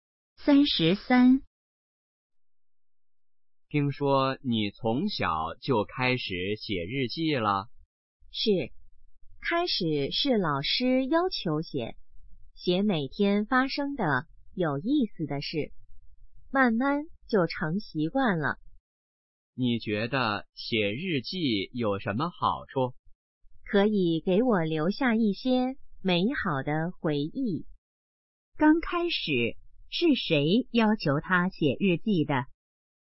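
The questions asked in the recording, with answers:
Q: 刚开始,是谁要求他写日记的?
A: 老师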